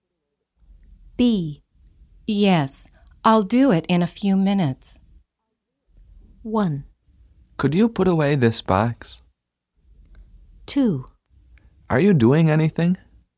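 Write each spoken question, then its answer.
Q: Yes, I'll do it in a few minutes.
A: 1: Could you put away this box?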